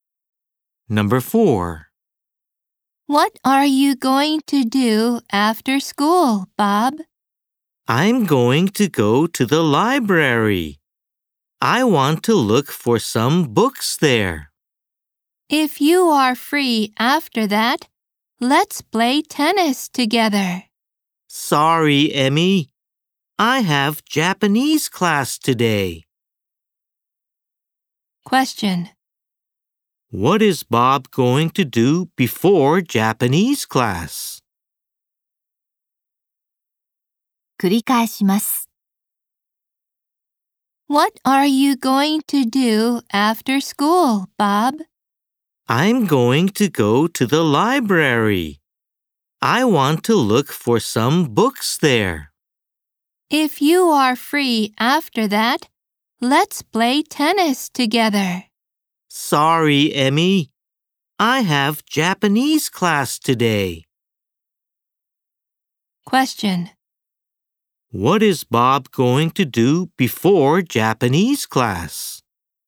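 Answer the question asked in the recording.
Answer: Go to the library to look for some books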